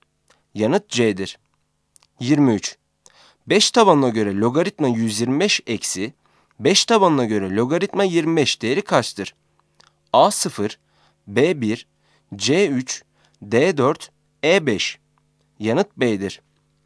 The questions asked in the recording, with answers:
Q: 5 tabanına göre logaritma 125 eksi, 5 tabanına göre logaritma 25 değeri kaçtır?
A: Yanıt B'dir.